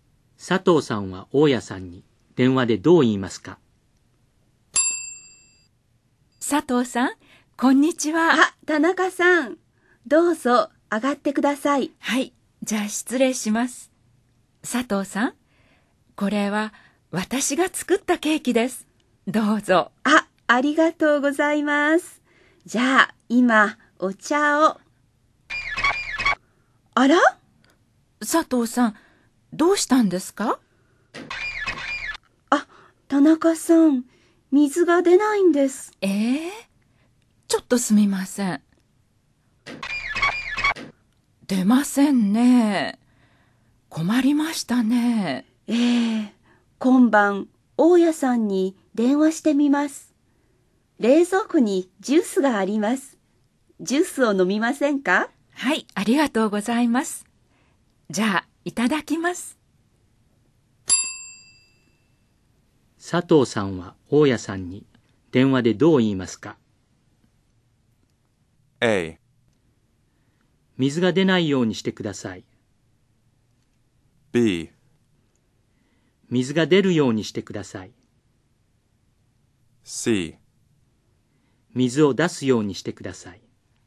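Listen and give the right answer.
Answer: B: 水が出るようにしてください。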